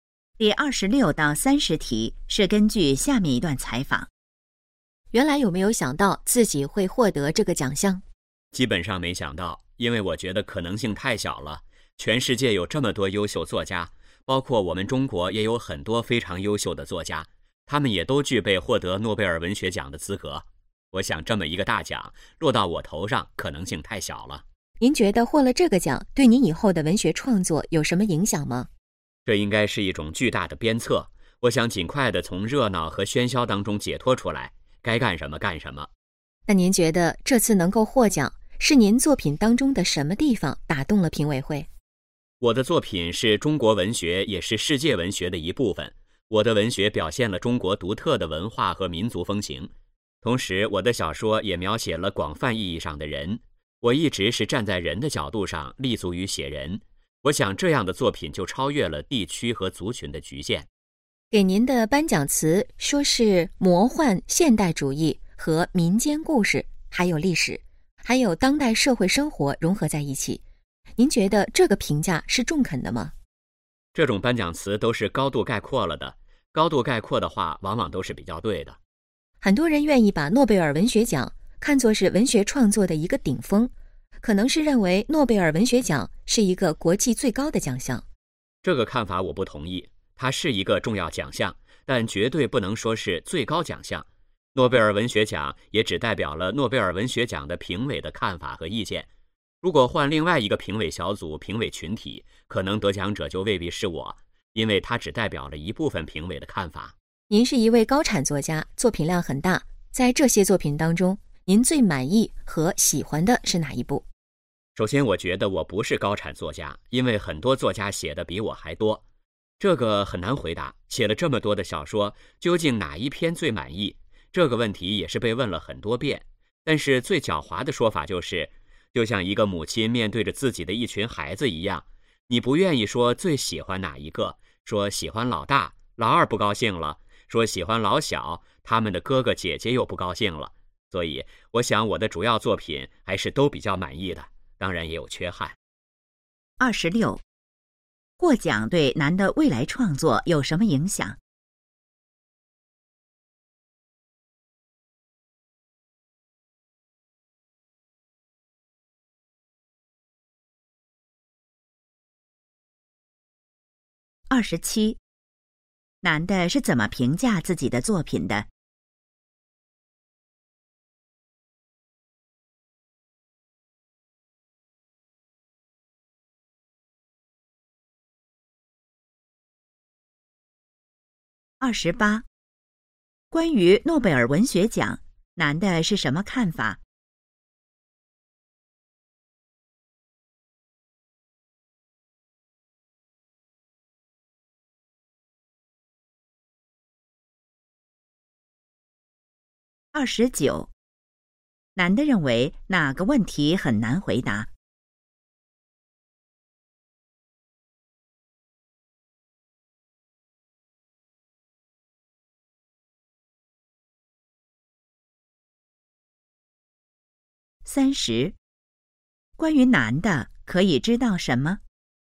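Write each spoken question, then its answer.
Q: 获奖对男的未来创作有什么影响?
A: 是一种巨大的鞭策

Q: 男的是怎么评价自己的作品的?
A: 主要作品都比较满意,但也有缺憾

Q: 关于诺贝尔文学奖,男的是什么看法?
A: 是重要奖项,但不是最高奖项

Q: 男的认为哪个问题很难回答。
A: 最满意哪一部作品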